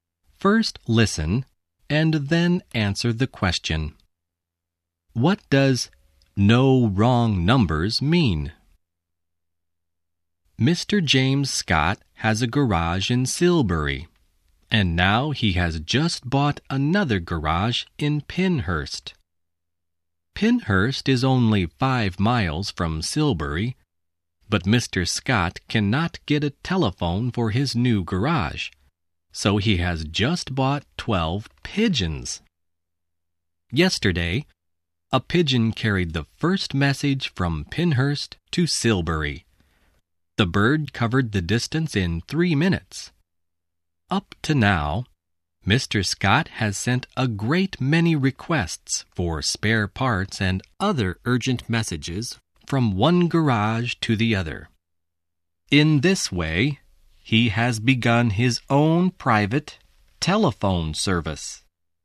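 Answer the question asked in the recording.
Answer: Mr. Scott uses pigeons to send messages between his garages, so no wrong telephone numbers can be dialled.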